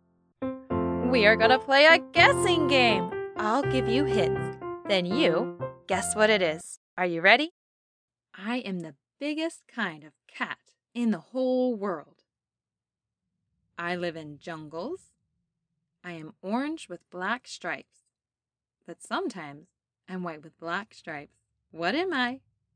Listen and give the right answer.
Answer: Tiger.